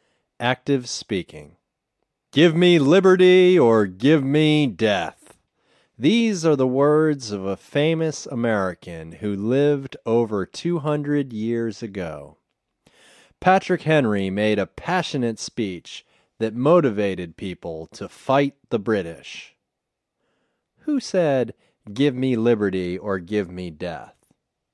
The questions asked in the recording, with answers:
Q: Who said, "Give me liberty or give me death"?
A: Patrick Henry said, "Give me liberty or give me death."